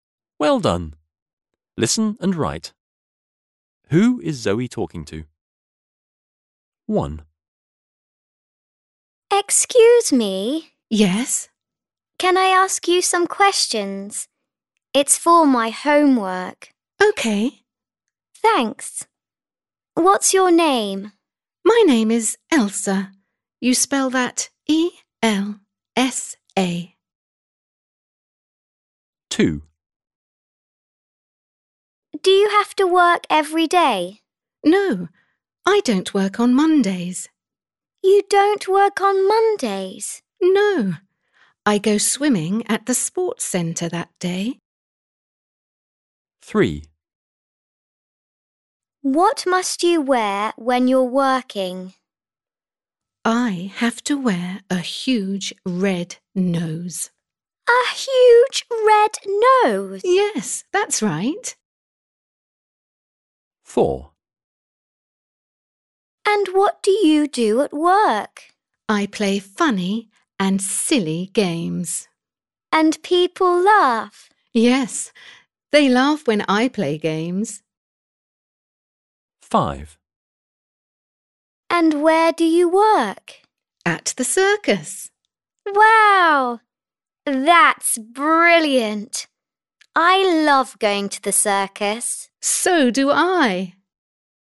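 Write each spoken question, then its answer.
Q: Who is Zoe talking to?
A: Elsa, a clown who works at the circus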